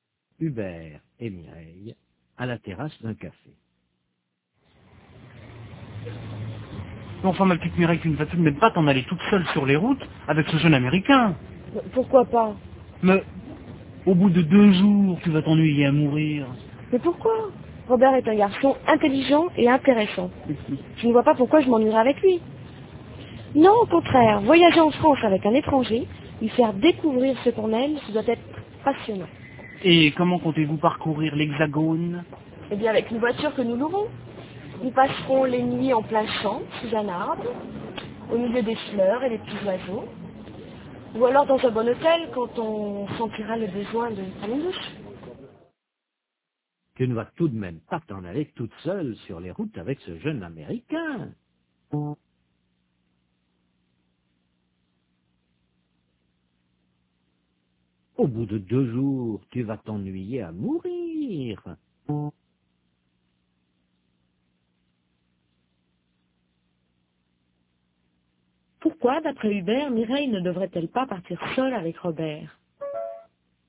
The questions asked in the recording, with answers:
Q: Pourquoi, d'après Hubert, Mireille ne devrait-elle pas partir seule avec Robert ?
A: Parce qu'au bout de 2 jours, elle va s'ennuyer à mourir.